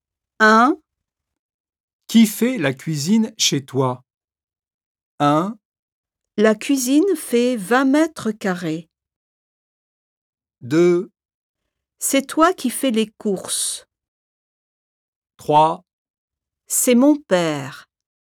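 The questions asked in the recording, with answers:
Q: Qui fait la cuisine chez toi?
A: 3: C'est mon père.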